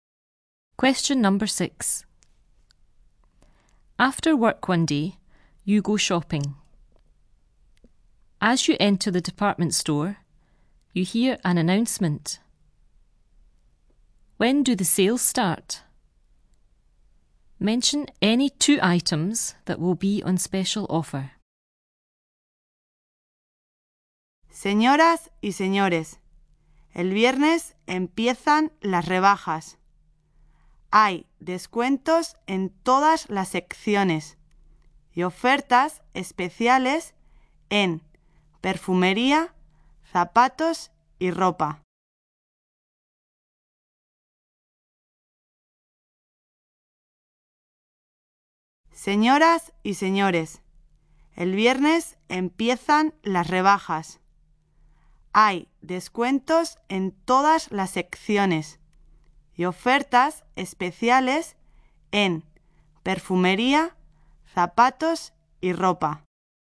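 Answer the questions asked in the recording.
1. Friday
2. Two of: perfume, shoes, clothes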